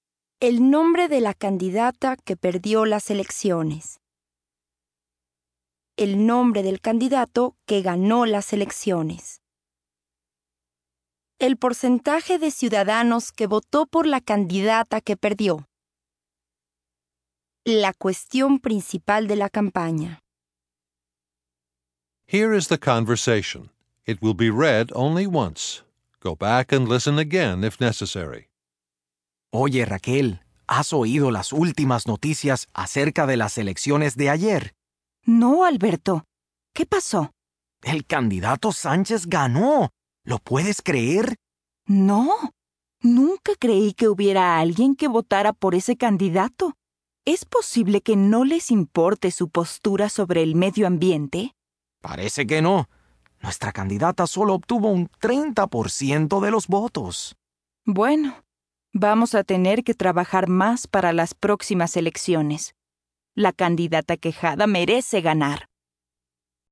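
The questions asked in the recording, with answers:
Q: El nombre del candidato que ganó las elecciones.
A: Sánchez

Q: El porcentaje de ciudadanos que votó por la candidata que perdió.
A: 30%

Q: La cuestión principal de la campaña.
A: el medio ambiente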